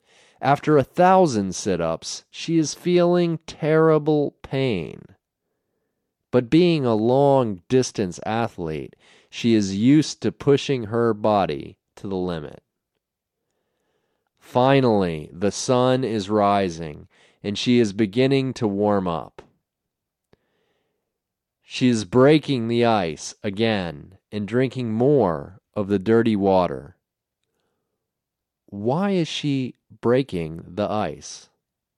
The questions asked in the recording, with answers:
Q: Why is she breaking the ice?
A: She is breaking the ice to drink the dirty water underneath.